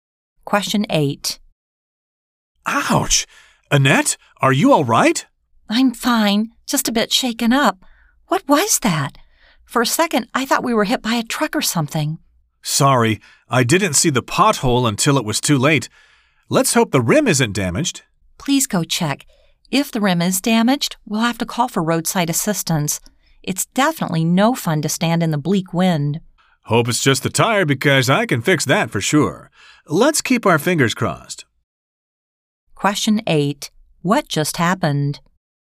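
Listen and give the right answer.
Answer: Their car hit a pothole.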